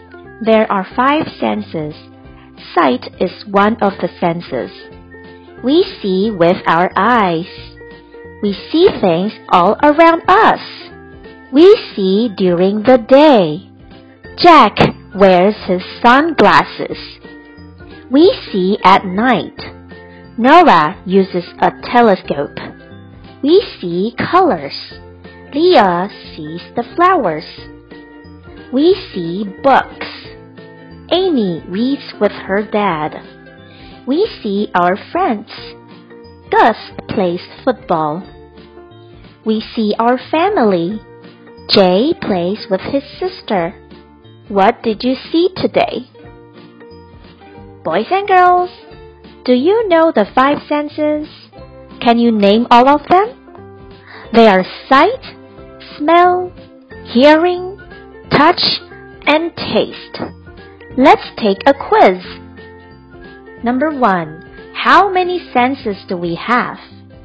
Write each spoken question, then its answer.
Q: how many senses do we have?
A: The answer is five.